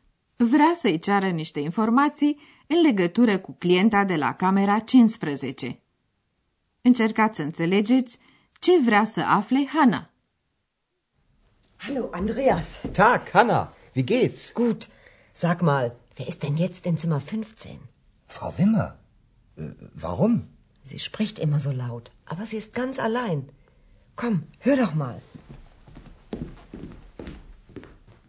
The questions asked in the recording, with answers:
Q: Încercați să înțelegeți ce vrea să afle Hana.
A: Hanna vrea să știe ce se întâmplă în camera 15, deoarece i-a atras atenția că femeia din cameră vorbește mereu tare.